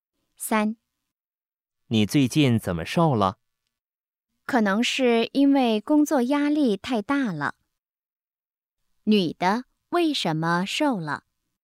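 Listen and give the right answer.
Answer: 工作压力太大了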